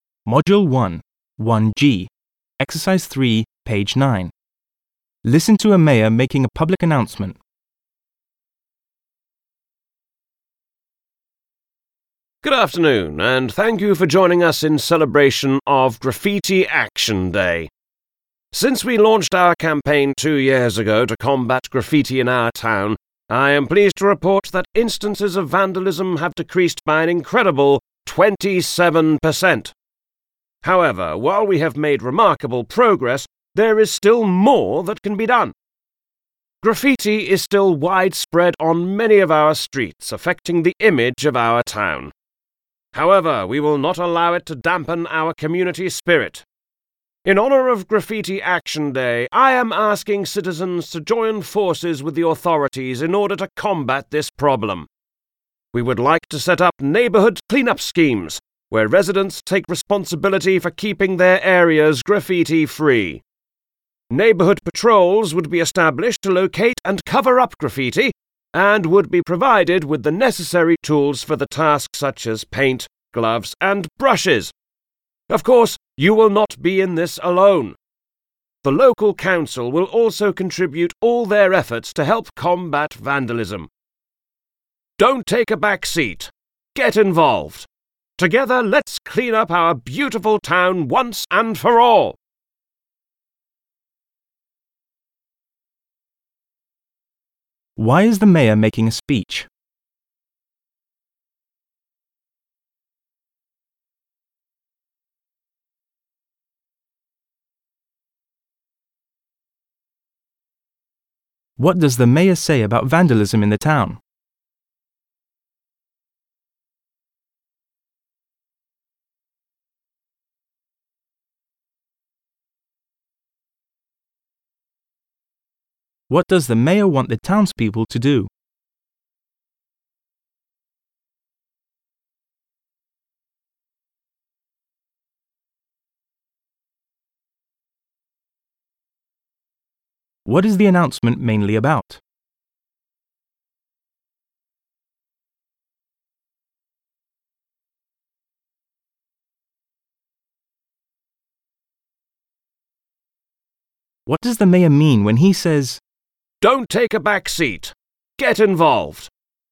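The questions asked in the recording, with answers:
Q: Why is the mayor making a speech?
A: To mark Graffiti Action Day and ask citizens to help fight graffiti

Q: What does the mayor say about vandalism in the town?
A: It has decreased by 27% in two years, but graffiti is still widespread

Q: What does the mayor want the townspeople to do?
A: Join neighbourhood clean-up schemes and patrols to cover up graffiti

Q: What is the announcement mainly about?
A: A community campaign against graffiti

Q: What does the mayor mean when he says,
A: People should take an active part instead of leaving it to others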